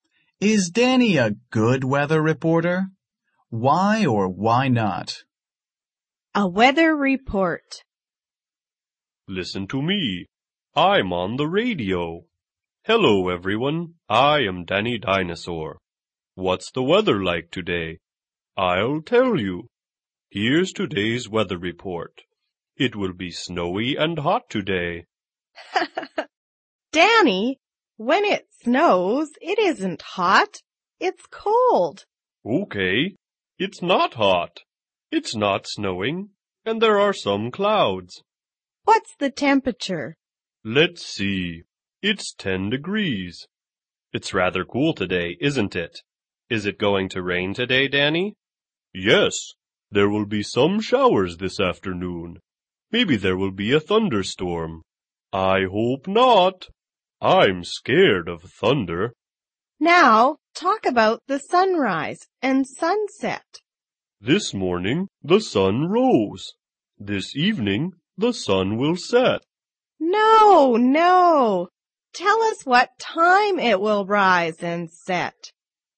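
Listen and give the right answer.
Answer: No, he makes mistakes (says snowy and hot, doesn't give sunrise/sunset times)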